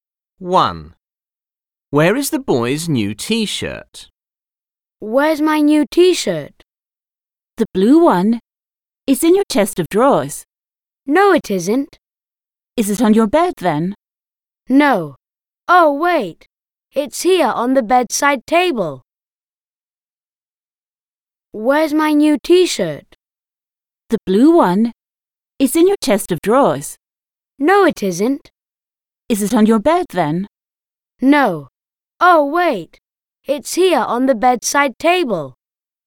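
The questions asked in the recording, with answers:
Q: Where is the boy's new T-shirt?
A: on the bedside table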